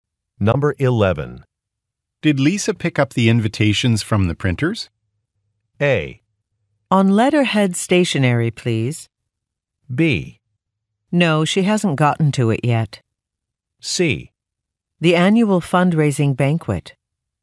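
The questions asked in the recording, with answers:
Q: Did Lisa pick up the invitations from the printers?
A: B: No, she hasn't gotten to it yet.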